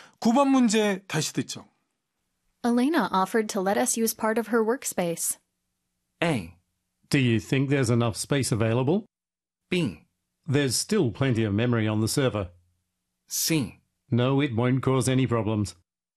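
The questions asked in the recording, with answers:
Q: Elena offered to let us use part of her workspace.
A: A: Do you think there's enough space available?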